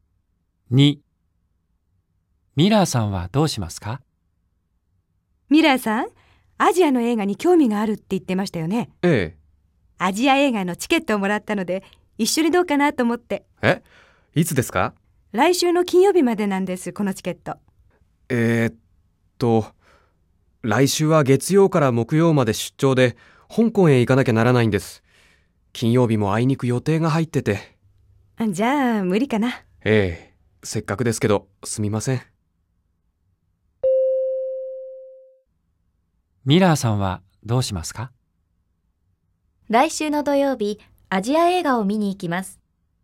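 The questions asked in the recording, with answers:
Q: ミラーさんはどうしますか?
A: ×(来週の土曜日、アジア映画を見に行きます。)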